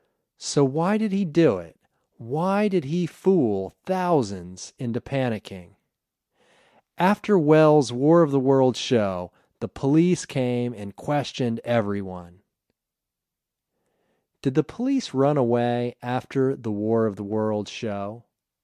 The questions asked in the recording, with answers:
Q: Did the police run away after the War of the Worlds show?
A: No, the police didn't run away after the War of the Worlds show.